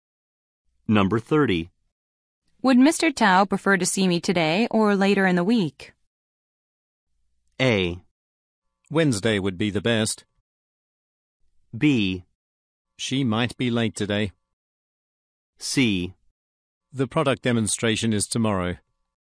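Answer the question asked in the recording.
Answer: A: Wednesday would be the best.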